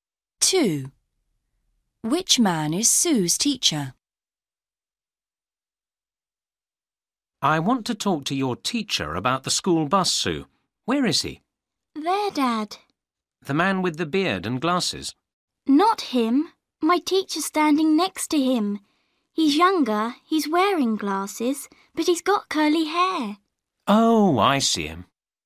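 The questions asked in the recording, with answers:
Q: Which man is Sue's teacher?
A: The younger man with glasses and curly hair, next to the man with the beard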